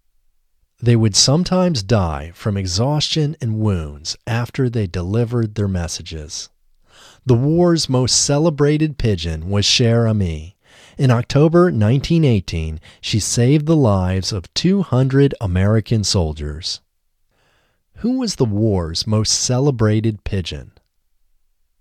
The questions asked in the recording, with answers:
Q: Who was the war's most celebrated pigeon?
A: The war's most celebrated pigeon was Cher Ami.